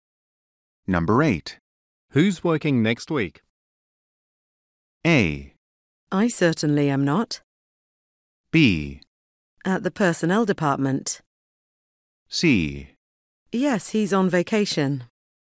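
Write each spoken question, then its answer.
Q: Who's working next week?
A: A: I certainly am not.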